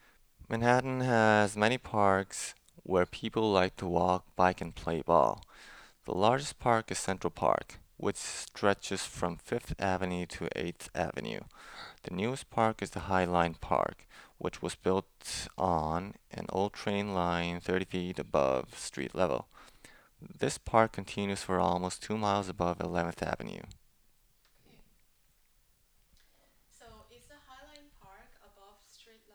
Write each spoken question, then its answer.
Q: So, is the High Line Park above street level?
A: Yeah, High Line Park is above the street level.